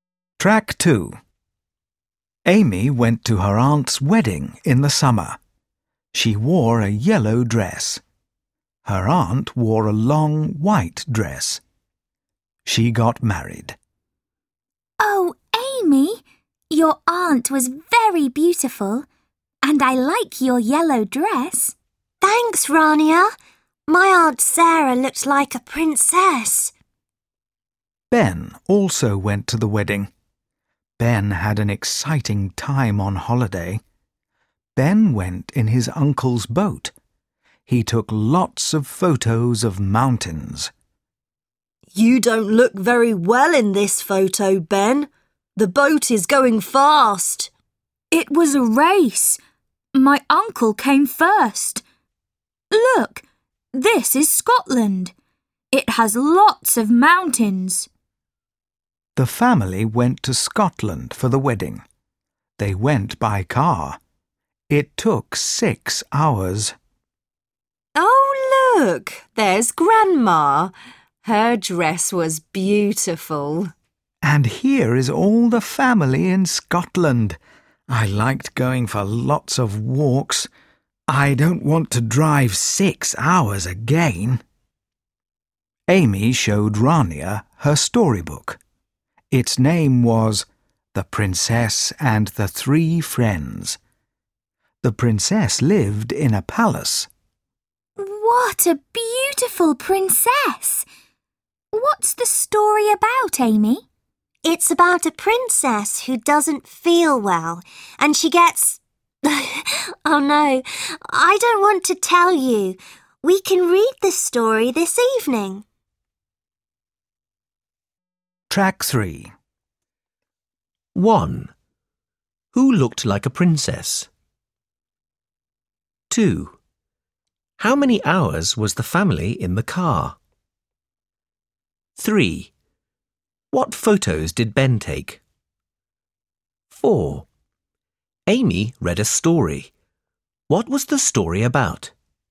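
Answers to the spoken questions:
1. Amy's Aunt Sarah
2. 6 hours
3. Photos of mountains
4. A princess who doesn't feel well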